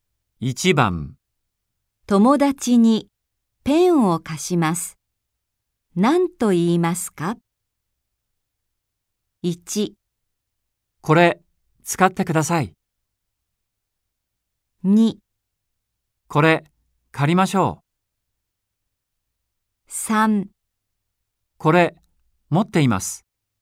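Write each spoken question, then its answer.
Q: 友達にペンを貸します。何と言いますか?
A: 1: これ使ってください。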